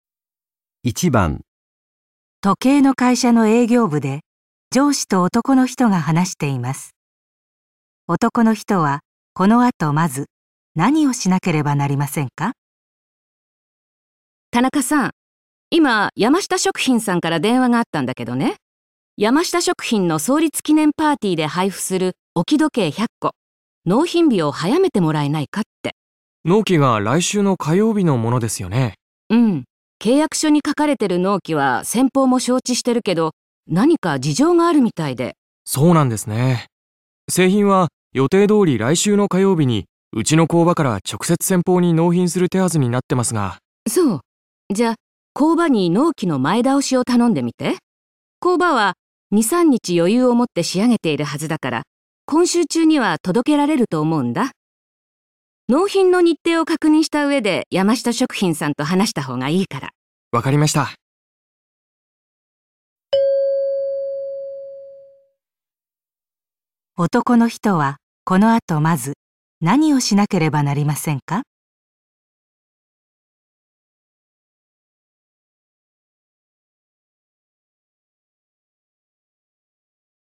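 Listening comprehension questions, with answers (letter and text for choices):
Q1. 1番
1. けいやくしょを確認する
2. 山下食品に納品に行く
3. 工場に納品日の変更を依頼する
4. 山下食品と打ち合わせをする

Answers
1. 3. 工場に納品日の変更を依頼する

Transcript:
女:うん、契約書に書かれてる納期は先方も承知してるけど、 何か事情があるみたいで。
男:そうなんですね。製品は予定通り来週の火曜日にうちの工場から直接先方に納品する手筈になってます
女:そう。じゃ、工場に納期の前倒しを頼んでみて。 工場は2,3日余裕をもって仕上げているはずだから。今週中には届けられると思うんだ。 納品の日程を確認した上で、 山下食品さんと話したほうがいいから。
男:わかりました。
男の人はこの後まず、 何をしなければなりませんか。

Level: N1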